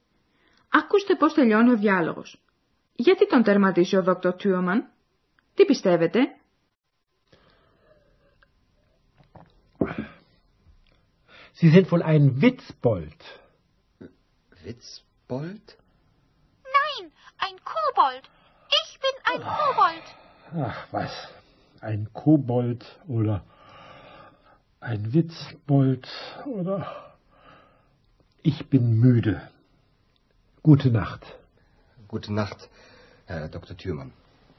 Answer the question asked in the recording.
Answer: Ο δόκτωρ Τούρμαν βάζει τέλος στη συζήτηση γιατί είναι κουρασμένος.